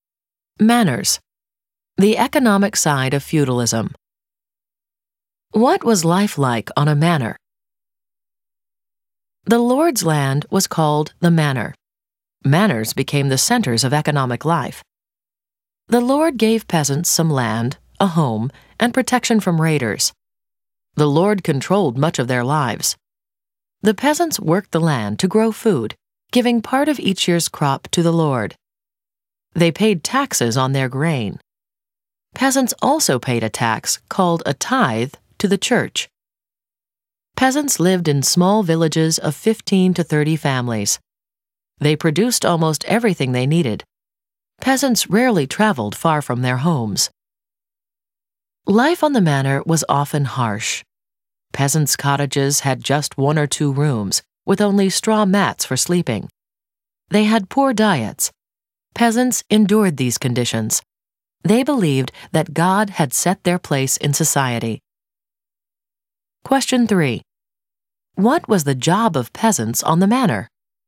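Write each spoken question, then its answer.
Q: What was the job of peasants on the manor?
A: To work the land to grow food, giving part of each crop to the lord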